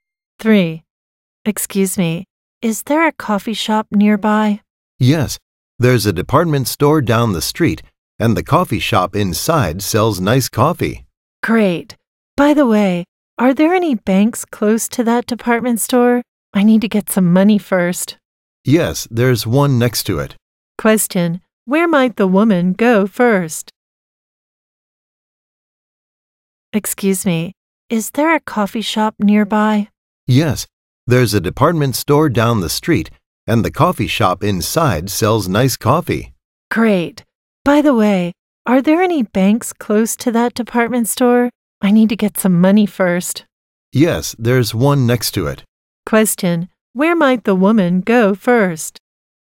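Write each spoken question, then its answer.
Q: Question, where might the woman go first?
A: The bank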